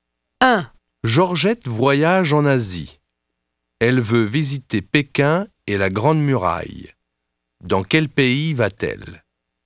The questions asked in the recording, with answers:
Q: Dans quel pays va-t-elle?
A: Elle va en Chine.